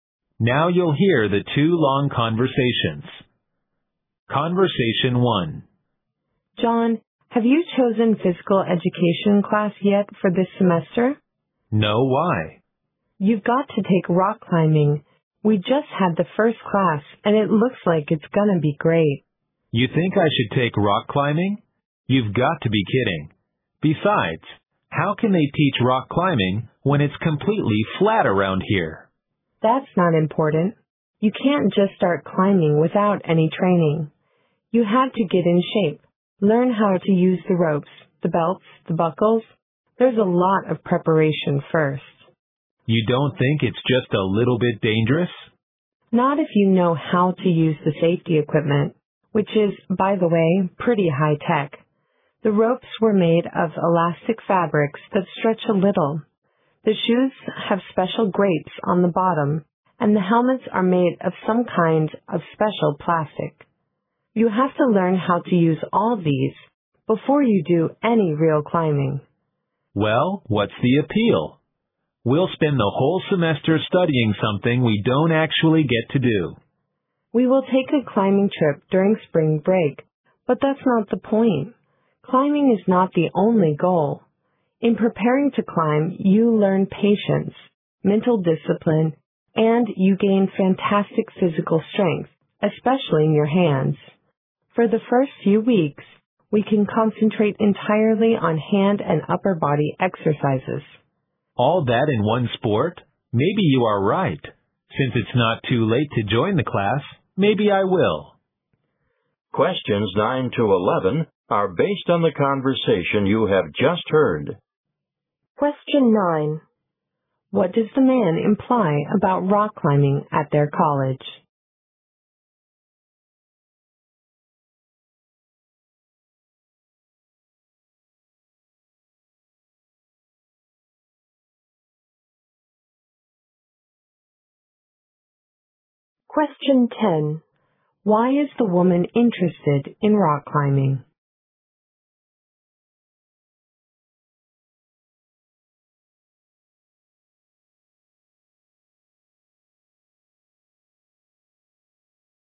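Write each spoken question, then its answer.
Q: What does the man imply about rock climbing at their college?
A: The area is completely flat, so there is nowhere to climb.

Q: Why is the woman interested in rock climbing?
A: It teaches patience and mental discipline and builds physical strength.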